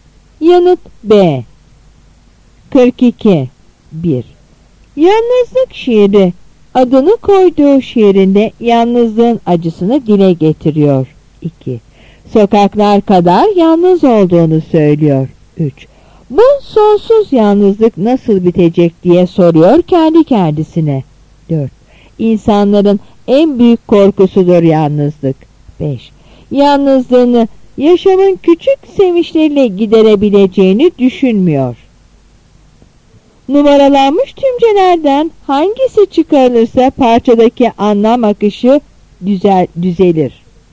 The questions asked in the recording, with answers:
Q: Numaralanmış tümcelerden hangisi çıkarılırsa parçadaki anlam akışı düzelir.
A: Yanıt D.